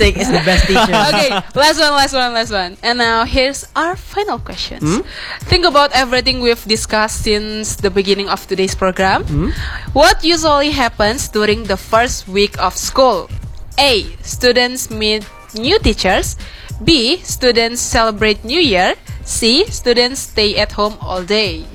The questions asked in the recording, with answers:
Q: What usually happens during the first week of school?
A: A. Okay, meet new teachers.